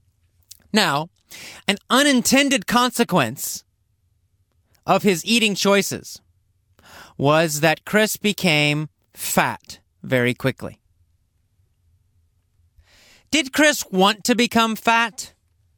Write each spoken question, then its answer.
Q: Did Chris want to become fat?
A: No, he didn't.